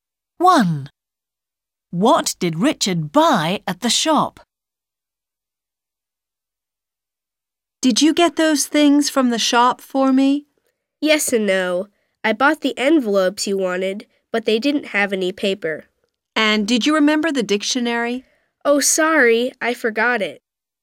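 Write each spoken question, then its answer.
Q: What did Richard buy at the shop?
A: envelopes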